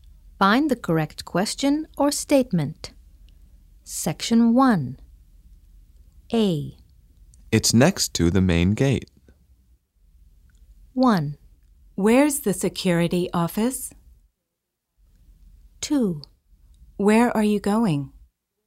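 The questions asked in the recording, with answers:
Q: It's next to the main gate.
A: 1: Where's the security office?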